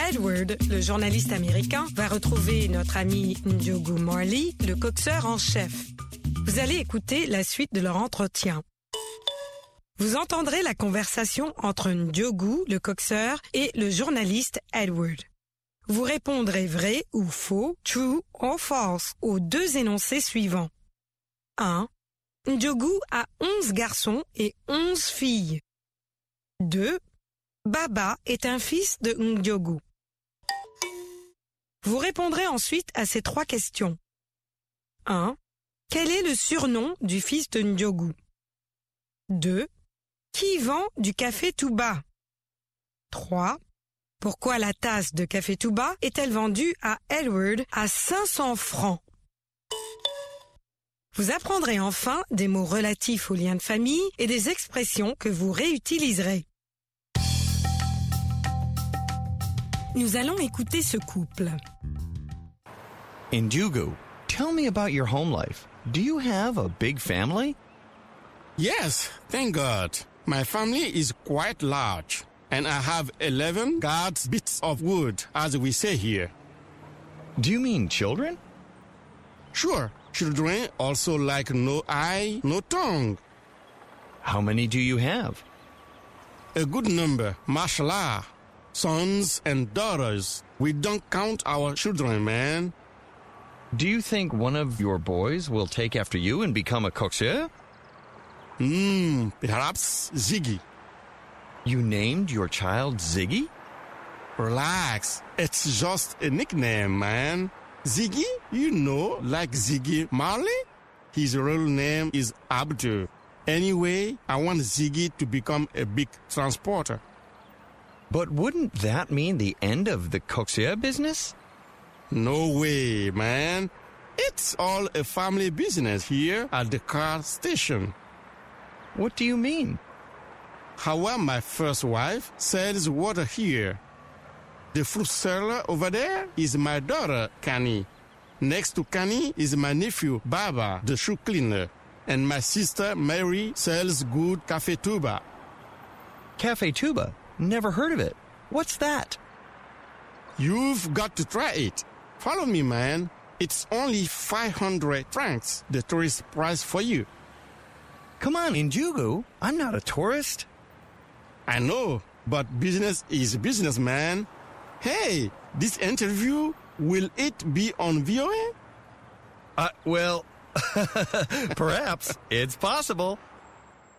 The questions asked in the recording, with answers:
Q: Ndiogou a 11 garçons et 11 filles.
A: L'énoncé 1 est faux.

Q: Baba est un fils de Ndiogou.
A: L'énoncé 2 est faux.

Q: Quel est le surnom du fils de Ndiogou?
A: Ziggy.

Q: Qui vend du café tout bas?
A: Marie, la sœur de Ndiogou.

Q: Pourquoi la tasse de café tout bas est-elle vendue à Edward à 500 francs?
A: C'est le prix pour touristes.